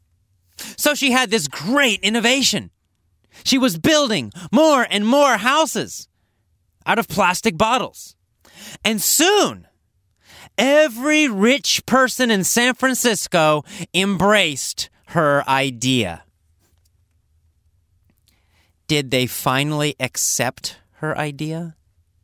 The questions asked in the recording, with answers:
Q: Did they finally accept her idea?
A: Yes, they did. They finally embraced her idea.